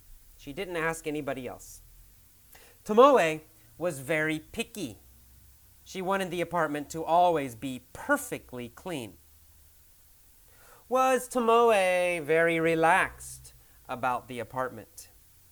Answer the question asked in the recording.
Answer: No. She was not relaxed. She was very picky.